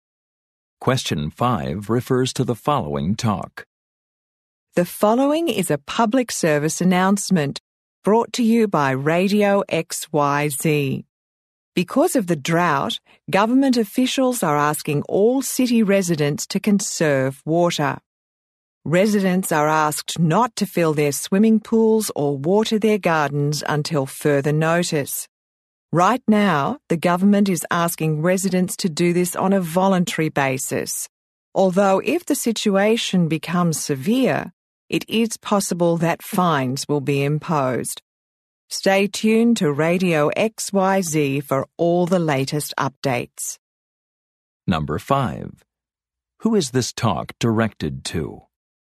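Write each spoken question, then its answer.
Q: Who is this talk directed to?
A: City residents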